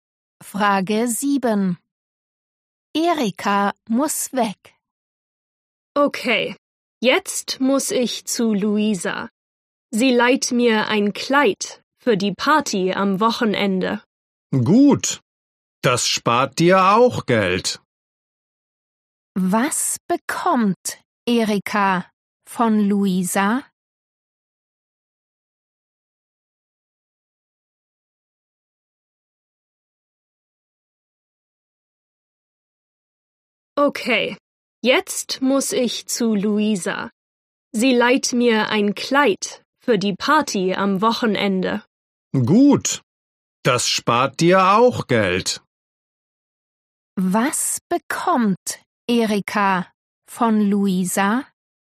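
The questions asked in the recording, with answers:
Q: Was bekommt Erika von Luisa?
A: ein Kleid (geliehen)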